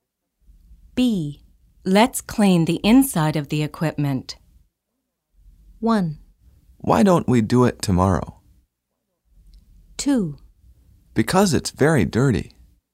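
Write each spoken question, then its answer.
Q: Let's clean the inside of the equipment.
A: 1: Why don't we do it tomorrow?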